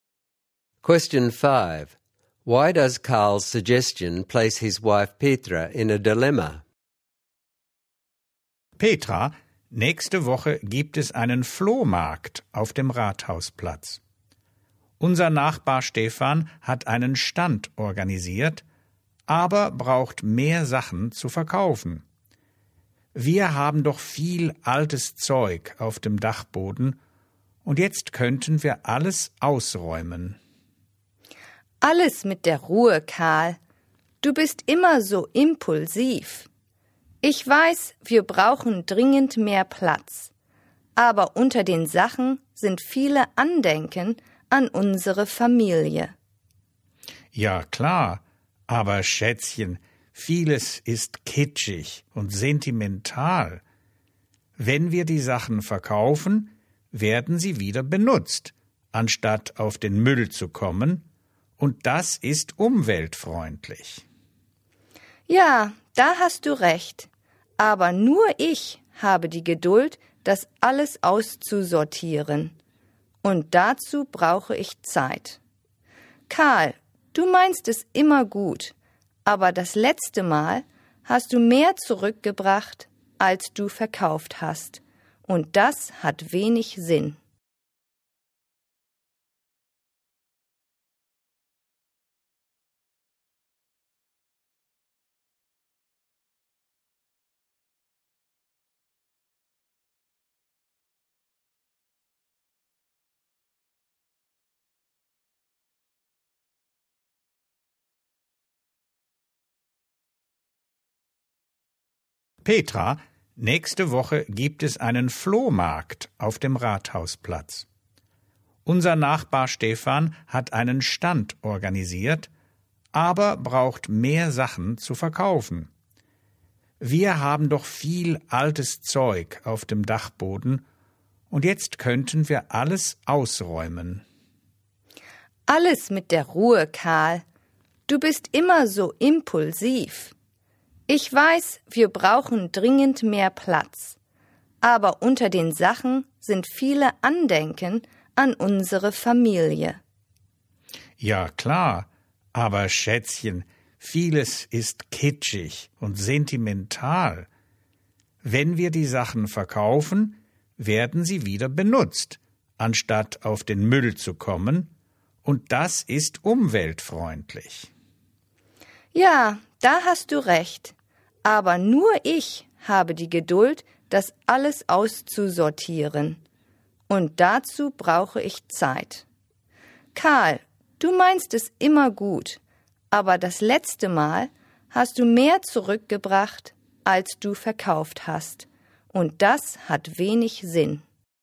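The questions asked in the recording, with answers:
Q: Why does Karl's suggestion place his wife Petra in a dilemma?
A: They need space and reselling is eco-friendly, but the items are family keepsakes, sorting takes her time, and last time Karl brought back more than he sold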